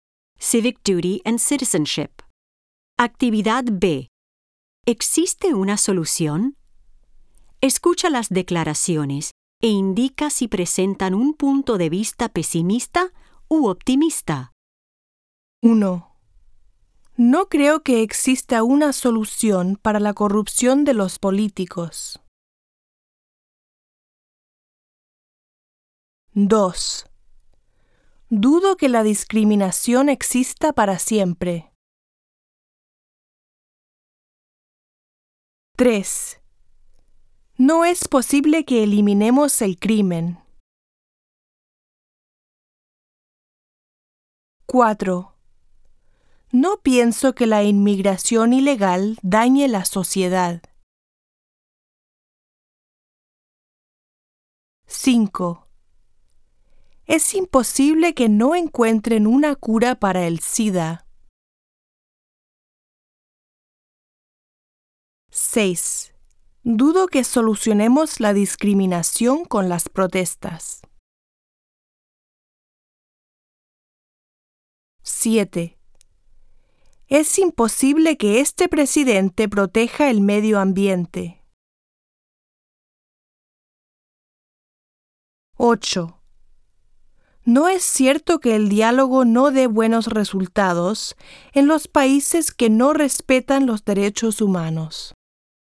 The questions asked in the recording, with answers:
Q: No creo que exista una solución para la corrupción de los políticos.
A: 1. Pesimista.

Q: Dudo que la discriminación exista para siempre.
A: 2. Optimista.

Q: No es posible que eliminemos el crimen.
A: 3. Pesimista.

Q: No pienso que la inmigración ilegal dañe la sociedad.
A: 4. Optimista.

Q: Es imposible que no encuentren una cura para el SIDA.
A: 5. Optimista.

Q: Dudo que solucionemos la discriminación con las protestas.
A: 6. Pesimista.

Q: Es imposible que este presidente proteja el medio ambiente.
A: 7. Pesimista.

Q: No es cierto que el diálogo no dé buenos resultados en los países que no respetan los derechos humanos.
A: 8. Optimista.